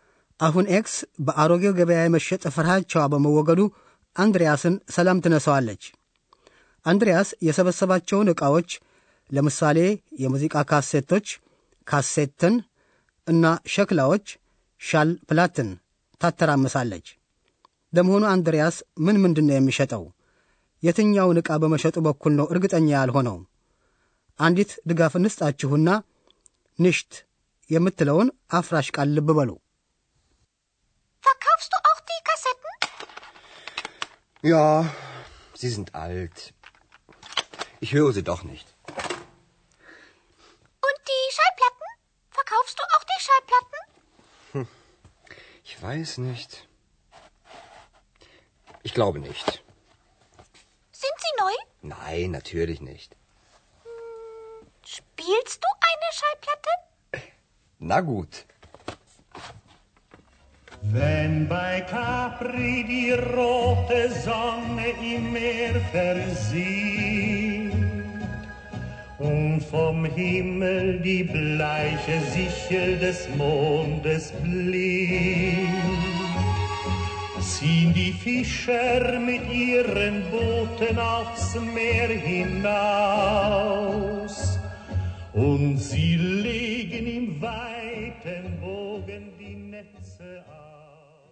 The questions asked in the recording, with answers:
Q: ለመሆኑ አንድሪያስ ምን ምንድን ነው የሚሸጠው?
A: አንድሪያስ ካሴቶቹን ለመሸጥ ይፈልጋል።